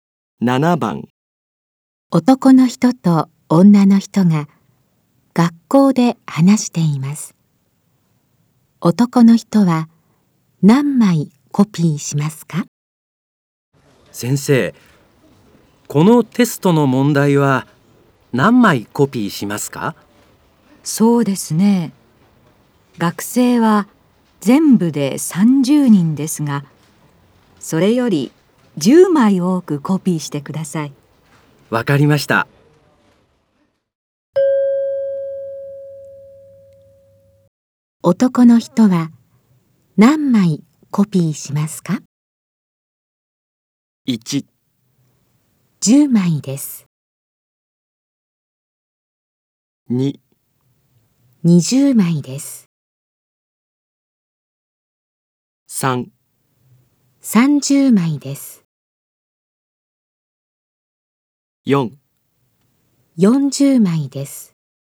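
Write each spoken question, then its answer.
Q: 男の人は何枚コピーしますか?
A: 4: 40枚です。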